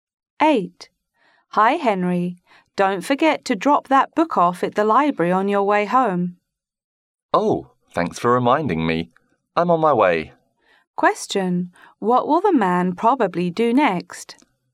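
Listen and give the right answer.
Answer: Go to the library to return the book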